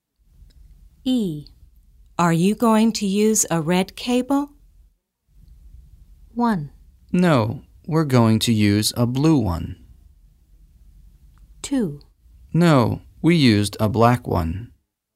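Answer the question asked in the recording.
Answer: 1: No, we're going to use a blue one.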